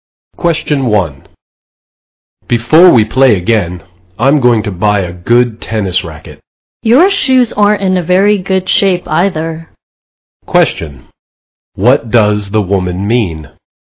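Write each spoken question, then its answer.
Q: What does the woman mean?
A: The man needs new tennis shoes too.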